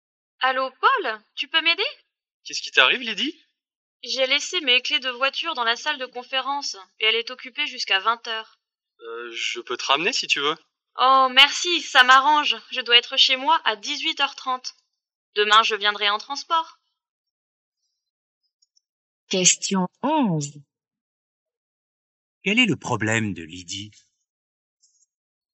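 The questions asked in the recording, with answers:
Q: Quel est le problème de Lydie?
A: Elle a laissé ses clés de voiture dans la salle de conférence, occupée jusqu'à 20h.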